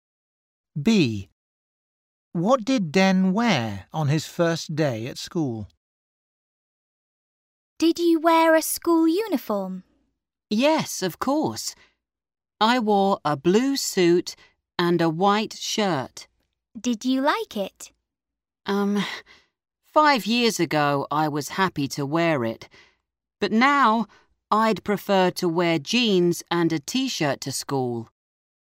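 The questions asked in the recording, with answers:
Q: What did Den wear on his first day at school?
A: A blue suit and a white shirt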